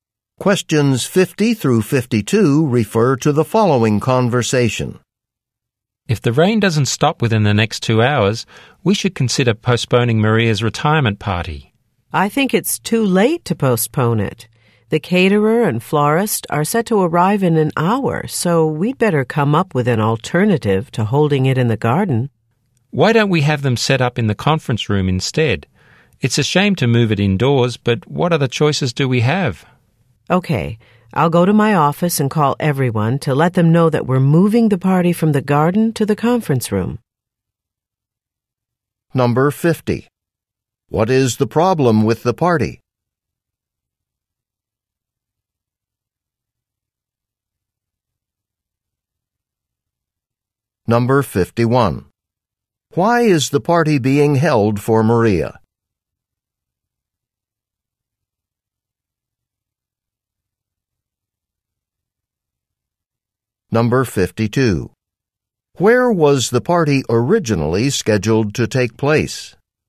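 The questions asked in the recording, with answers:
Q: What is the problem with the party?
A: It is raining

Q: Why is the party being held for Maria?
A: She is retiring

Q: Where was the party originally scheduled to take place?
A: In the garden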